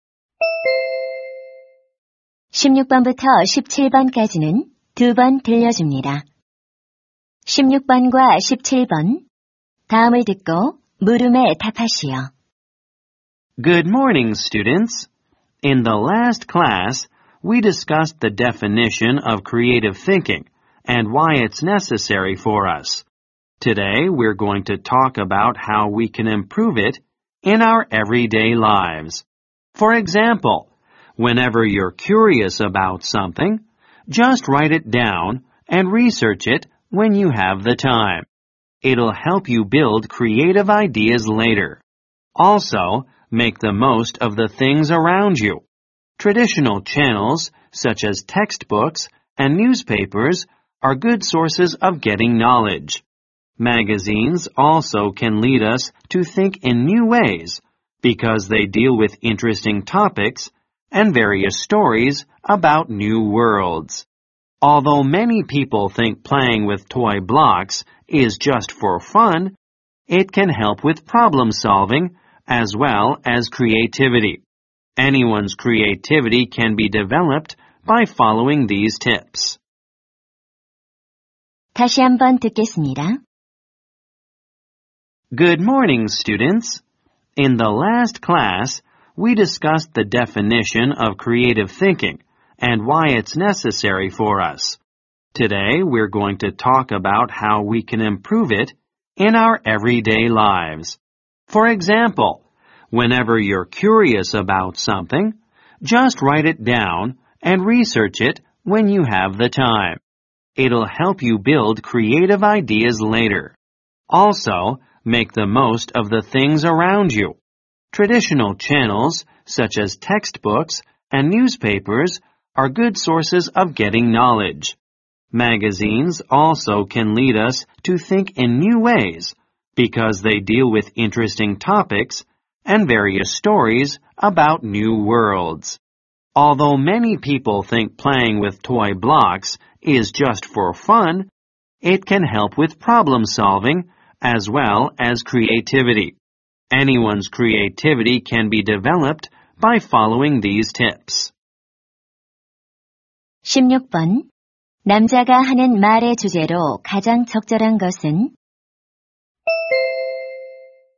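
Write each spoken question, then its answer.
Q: 남자가 하는 말의 주제로 가장 적절한 것은?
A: 일상생활에서 창의력을 향상시키는 방법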